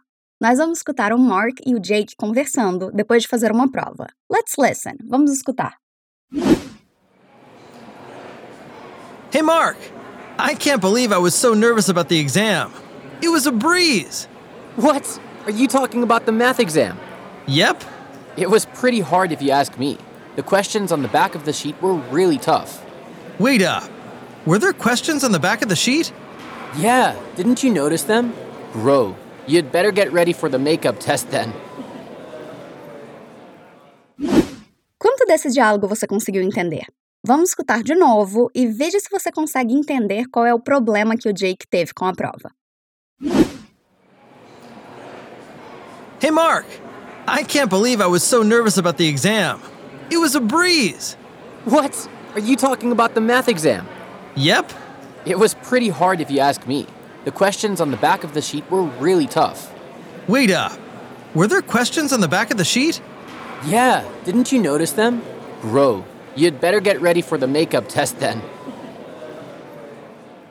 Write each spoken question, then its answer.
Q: Vamos escutar de novo e veja se você consegue entender qual é o problema que o Jake teve com a prova.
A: O Jake não notou que a prova tinha questões no verso da folha.